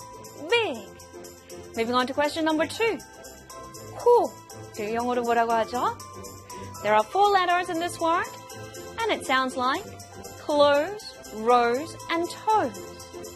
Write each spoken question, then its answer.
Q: 코. 영어로 뭐라고 하죠?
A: It is, of course, N-O-S-E, nose.